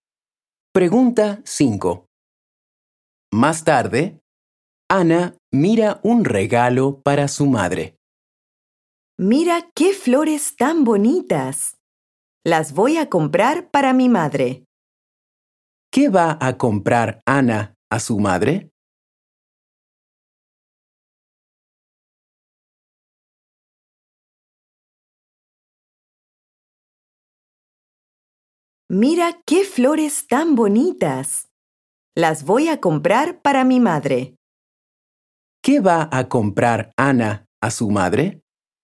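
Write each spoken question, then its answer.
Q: ¿Qué va a comprar Ana a su madre?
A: Flores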